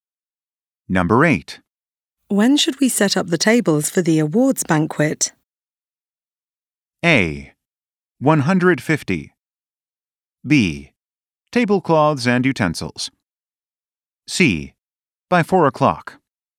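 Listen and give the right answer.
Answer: C: By 4 o'clock.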